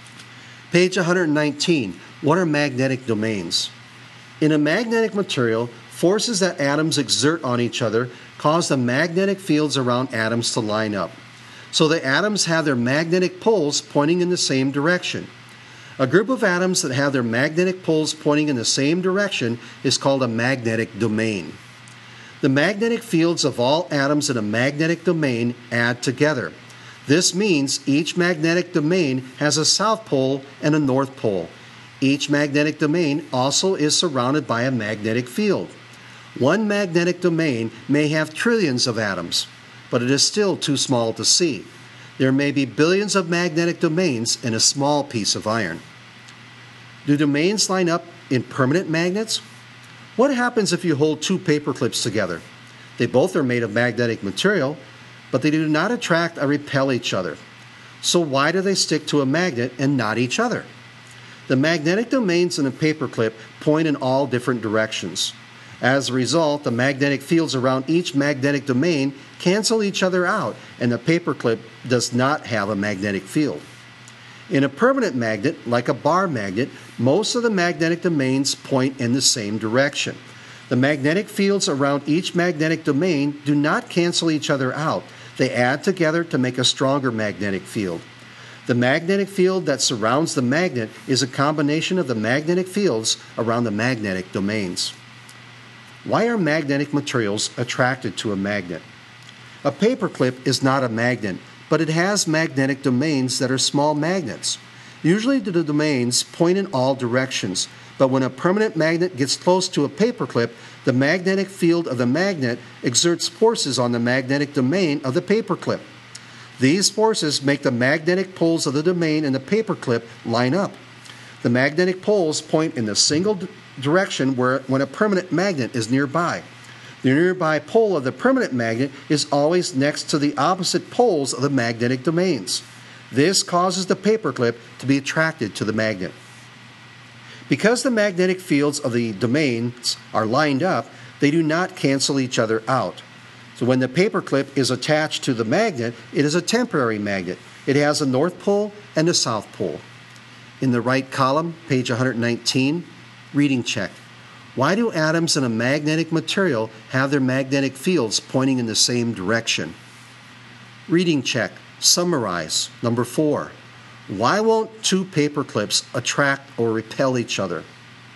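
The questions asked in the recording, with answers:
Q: Why won't two paper clips attract or repel each other?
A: Their magnetic domains point in all different directions, so the magnetic fields cancel out and the paper clips have no magnetic field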